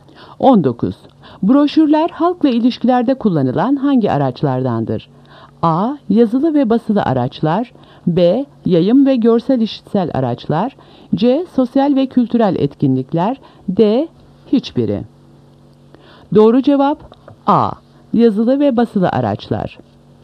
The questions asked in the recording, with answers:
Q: Broşürler halkla ilişkilerde kullanılan hangi araçlardandır?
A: Doğru cevap A. Yazılı ve basılı araçlar.